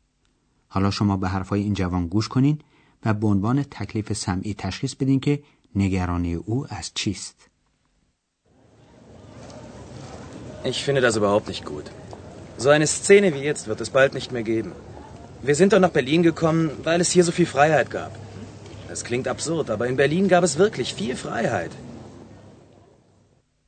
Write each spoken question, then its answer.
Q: نگرانی او از چیست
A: پس ترس یا نگرانی جوان از اینه که چنین صحنه‌ای مثل حالا در آتی نزدیک دیگه وجود نخواهد داشت